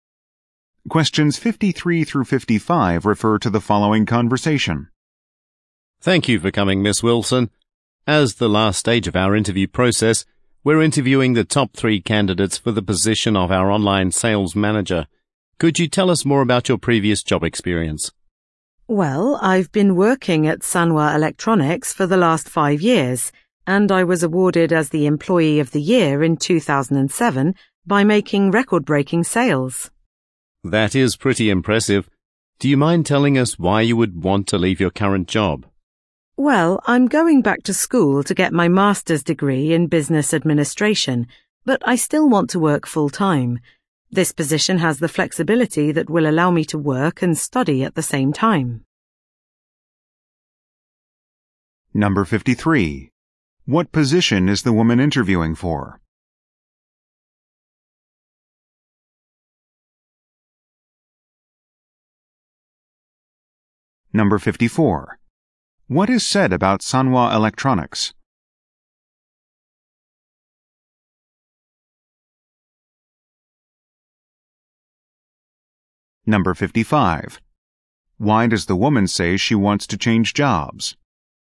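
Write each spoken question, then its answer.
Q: What position is the woman interviewing for?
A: Online sales manager

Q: Why does the woman say she wants to change jobs?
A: To work while studying for her master's degree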